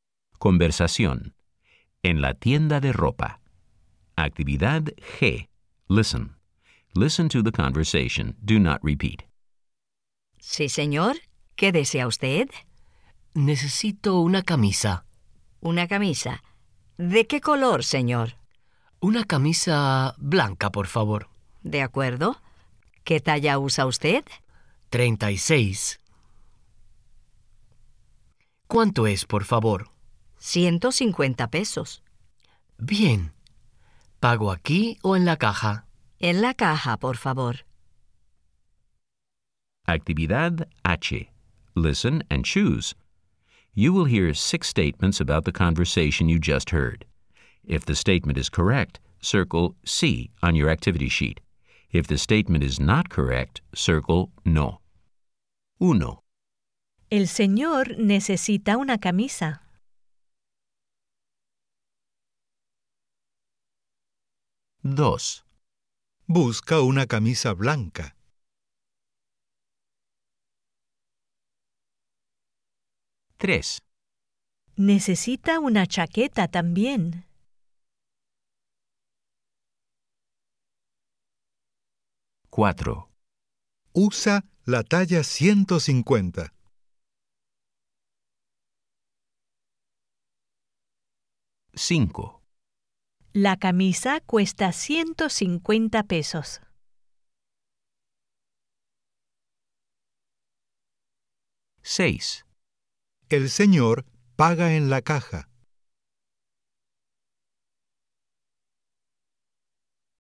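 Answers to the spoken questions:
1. Sí
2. Sí
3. No
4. No
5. Sí
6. Sí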